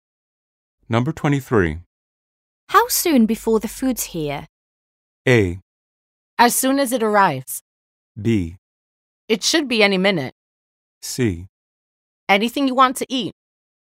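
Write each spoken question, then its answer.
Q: How soon before the food's here?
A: B: It should be any minute.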